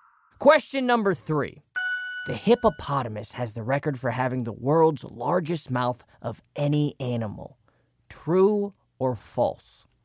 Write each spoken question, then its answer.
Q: The hippopotamus has the record for having the world's largest mouth of any animal.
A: And that is true.